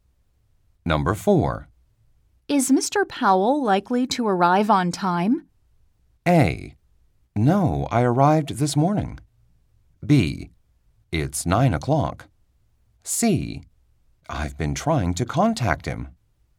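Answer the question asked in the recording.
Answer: C: I've been trying to contact him.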